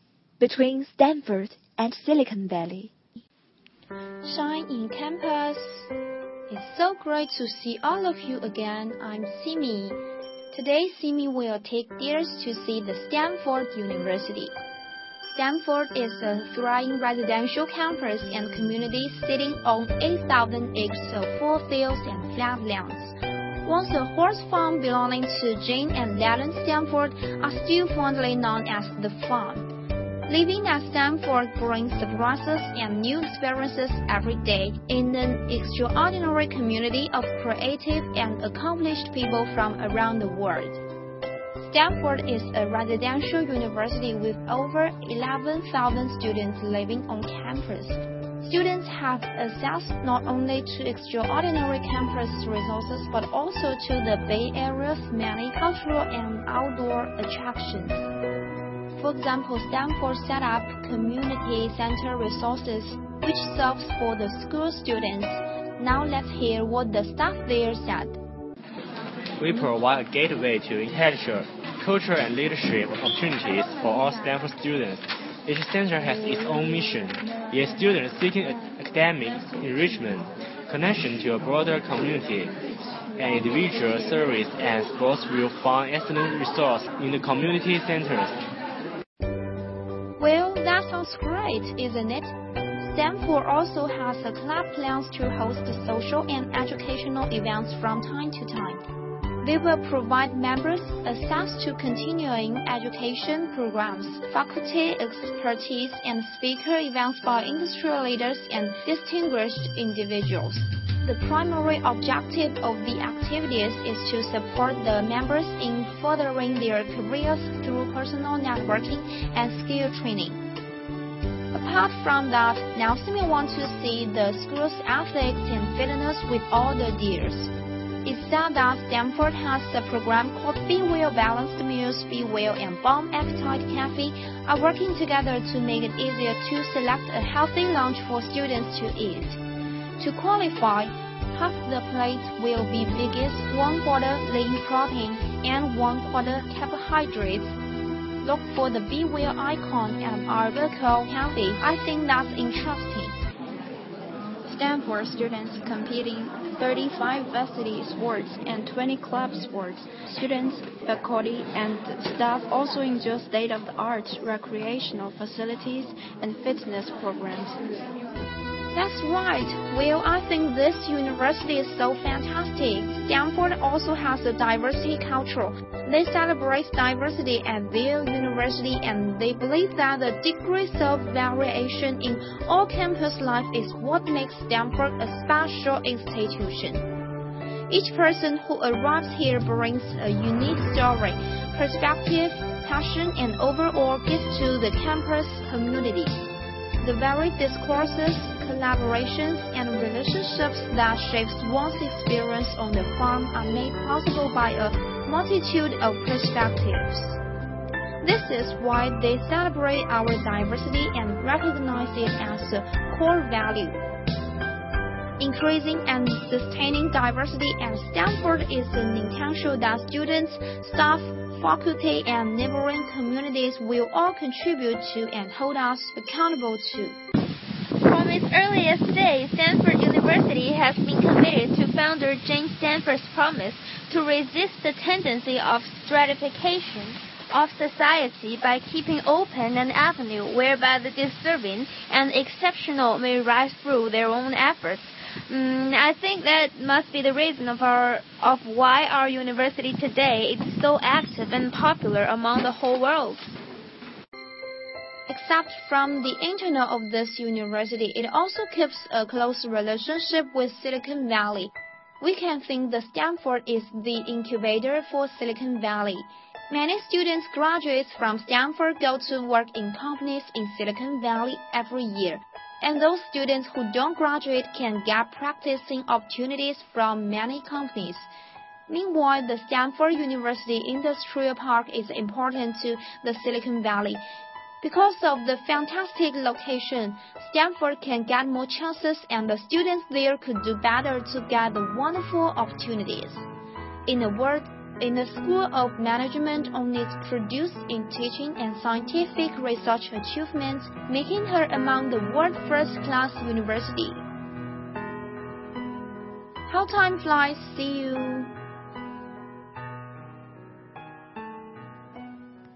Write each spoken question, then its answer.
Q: what's the relationship between Stanford and Silicon Valley?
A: Stanford is the incubator of Silicon Valley.